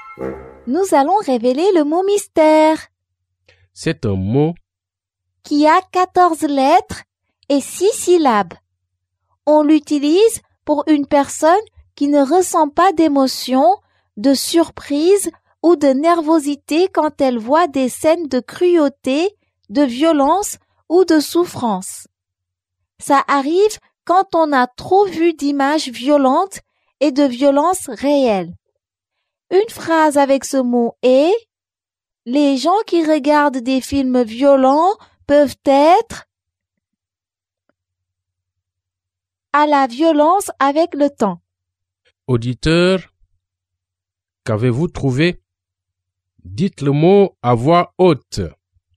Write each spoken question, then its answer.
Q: Auditeur, qu'avez-vous trouvé?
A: Le mot mystère est désensibilisé.